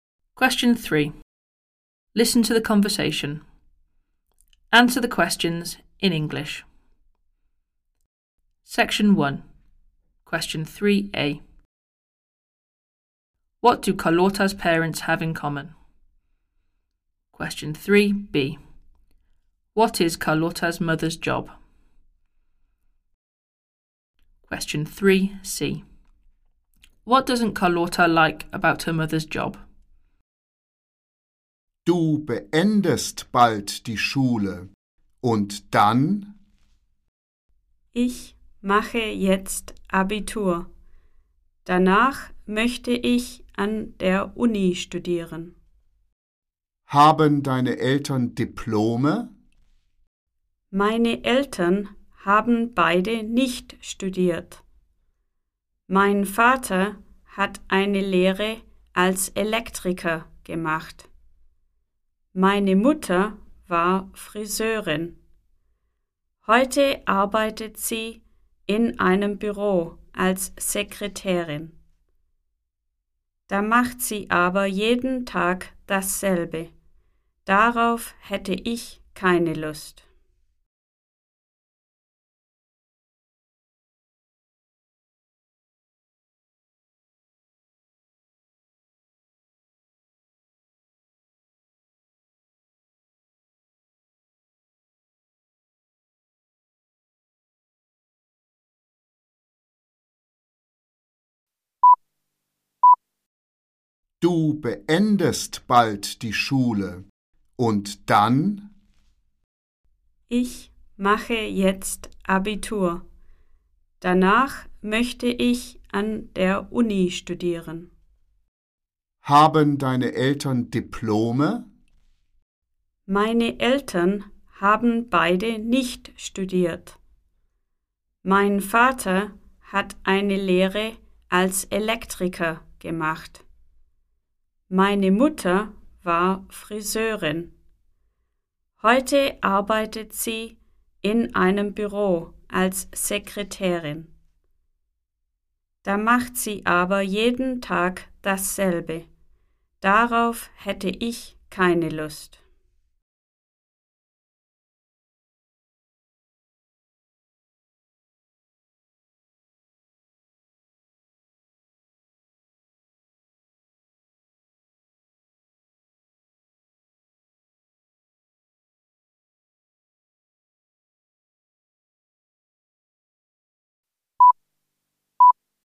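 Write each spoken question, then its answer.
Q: What do Carlotta's parents have in common?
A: Neither of them went to university

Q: What is Carlotta's mother's job?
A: Secretary in an office

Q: What doesn't Carlotta like about her mother's job?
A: She does the same thing every day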